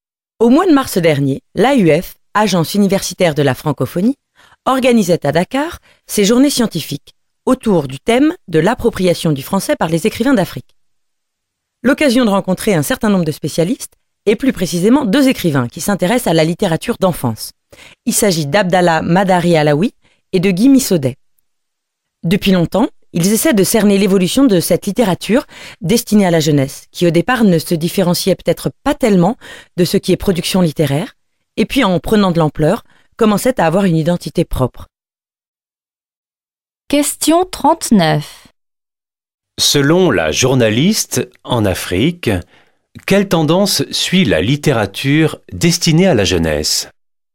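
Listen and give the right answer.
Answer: Elle acquiert progressivement une identité propre, distincte de la production littéraire générale.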